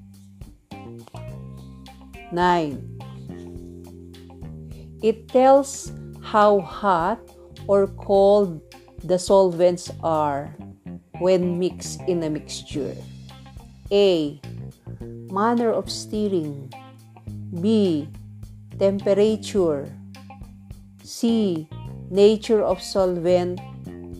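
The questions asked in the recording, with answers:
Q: It tells how hot or cold the solvents are when mixed in a mixture.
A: B: Temperature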